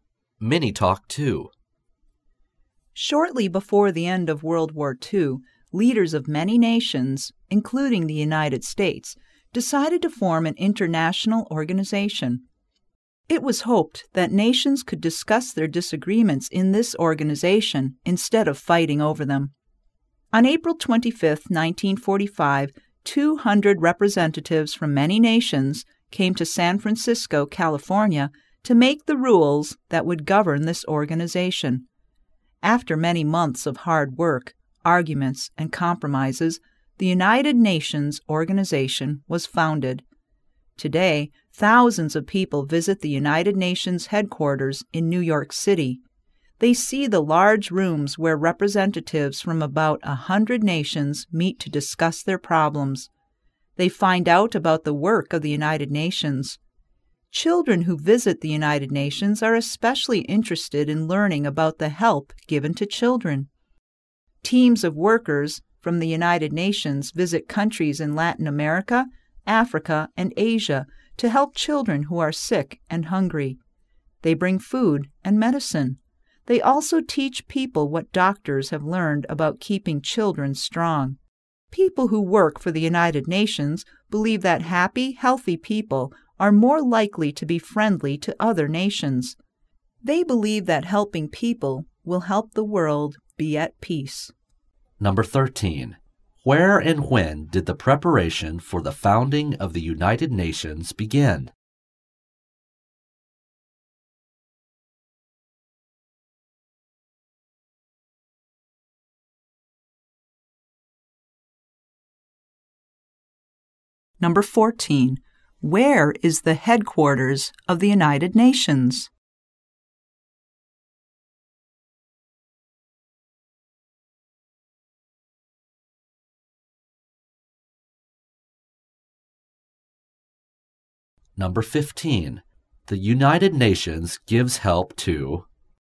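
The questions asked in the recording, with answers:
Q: Where and when did the preparation for the founding of the United Nations begin?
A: In San Francisco, California, on April 25, 1945

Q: Where is the headquarters of the United Nations?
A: In New York City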